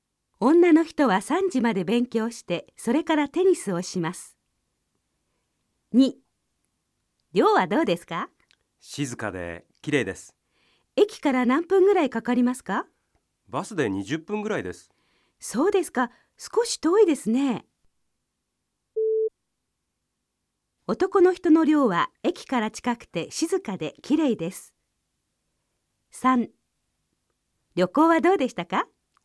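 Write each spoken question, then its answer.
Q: 男の人の寮は駅から近くて静かで綺麗です。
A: 正しくない(×):駅からバスで20分で遠い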